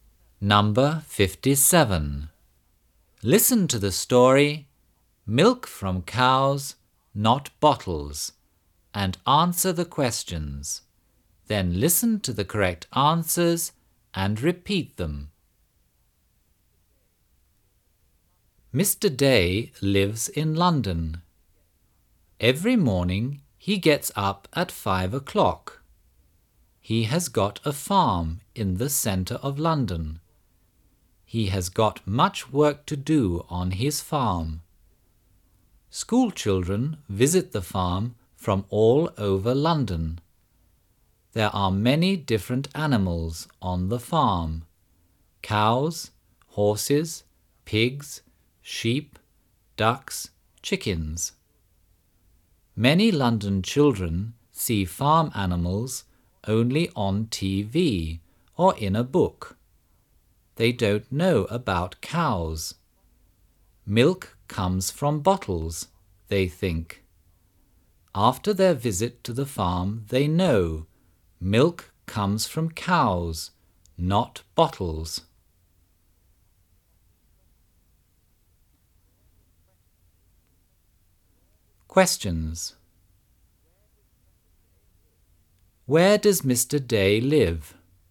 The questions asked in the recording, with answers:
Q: Where does Mr. Day live?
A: He lives in London.